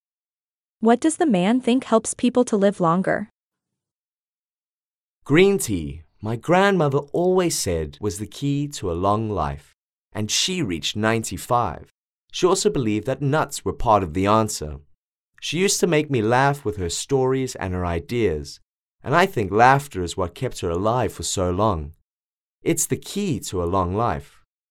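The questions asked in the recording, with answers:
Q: What does the man think helps people to live longer?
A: laughter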